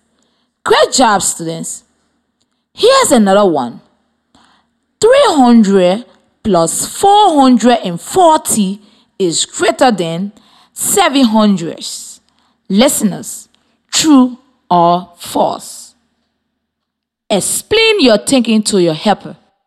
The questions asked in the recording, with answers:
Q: Listeners, true or false?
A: It is true.